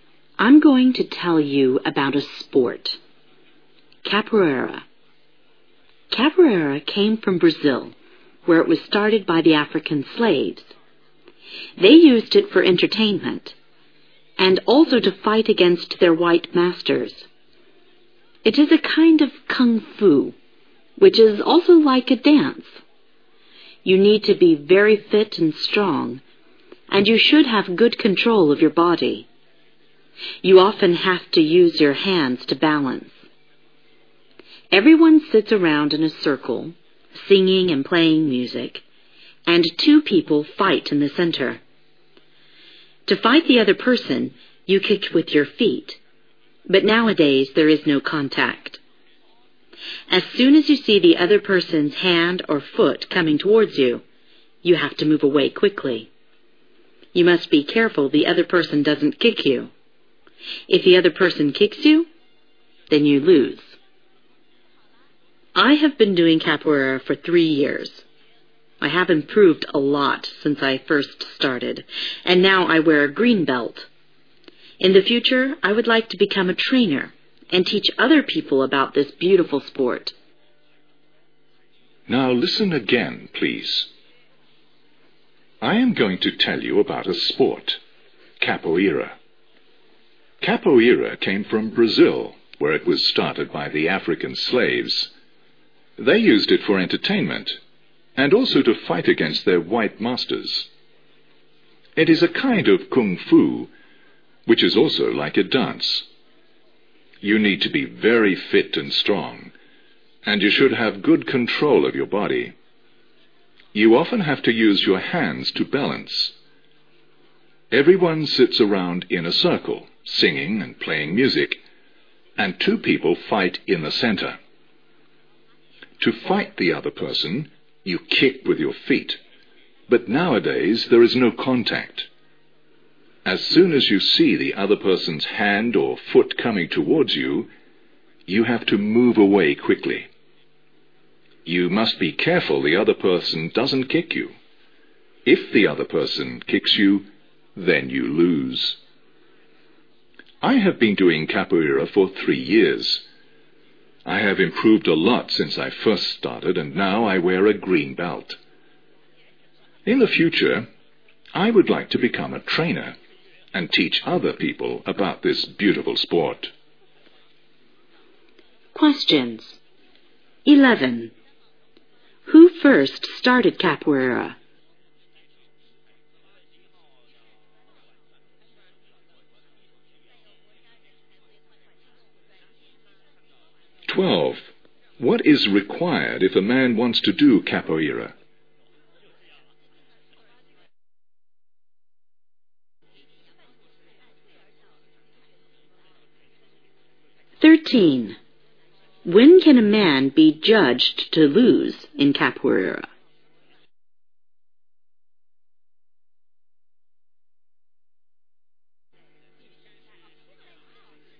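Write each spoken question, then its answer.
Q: Who first started capoeira?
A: African slaves in Brazil

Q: What is required if a man wants to do capoeira?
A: Being very fit and strong, with good control of the body

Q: When can a man be judged to lose in capoeira?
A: When the other person kicks him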